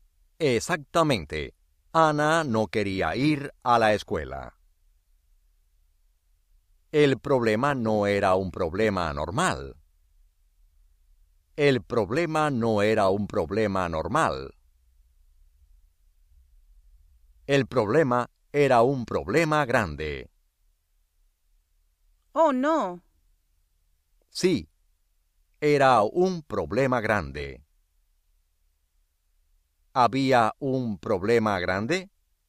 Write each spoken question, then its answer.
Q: ¿Había un problema grande?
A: Sí.